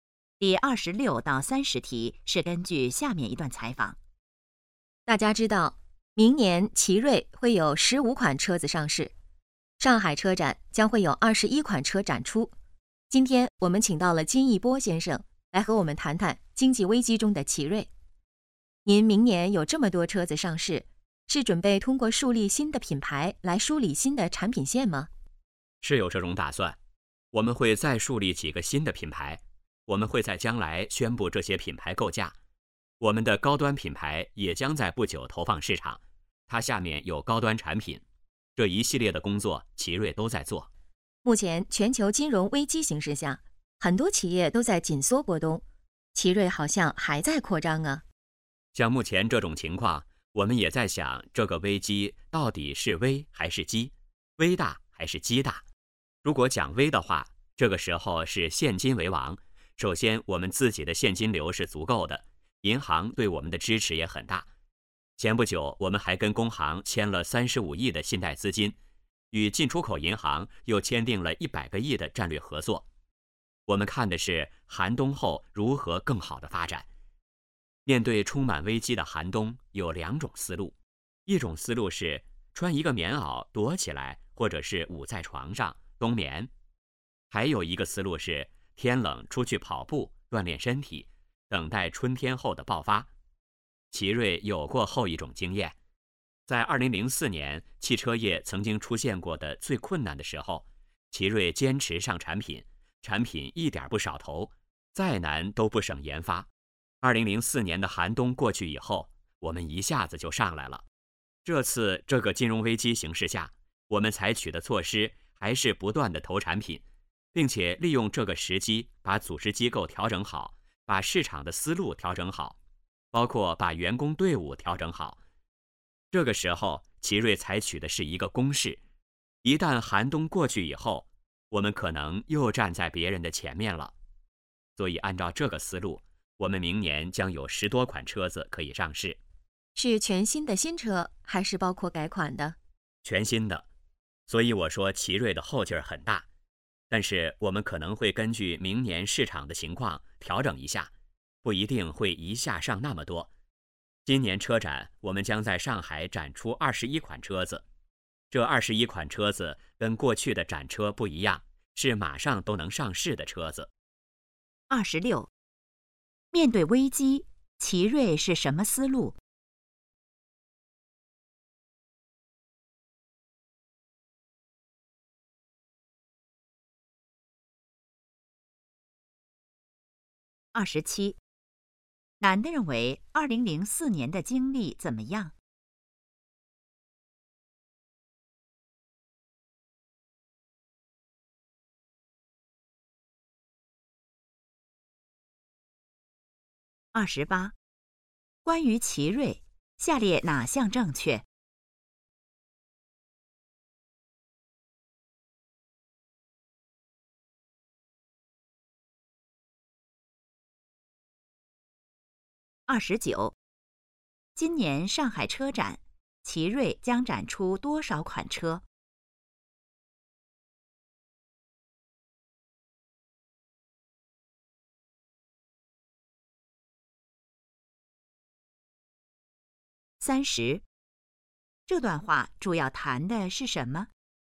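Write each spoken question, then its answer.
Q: 面对危机,奇瑞是什么思路?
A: 采取攻势,不断投产品,像天冷出去跑步锻炼

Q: 今年上海车展,奇瑞将展出多少款车?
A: 21款

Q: 这段话主要谈的是什么?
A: 经济危机中的奇瑞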